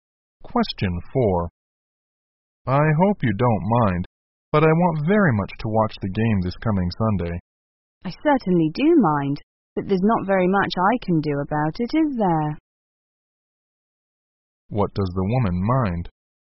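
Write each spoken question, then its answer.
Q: What does the woman mind?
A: That the man will watch the game on Sunday.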